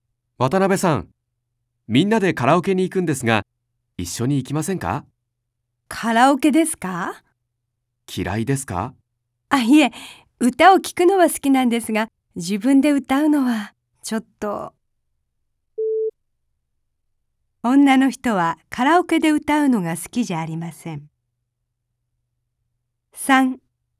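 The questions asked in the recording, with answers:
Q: 女の人はカラオケで歌うのが好きじゃありません。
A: 正しい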